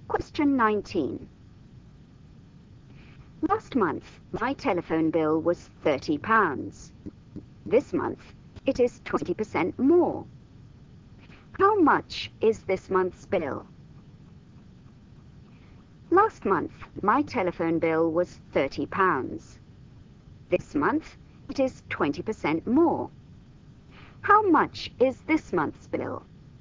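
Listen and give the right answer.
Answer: £36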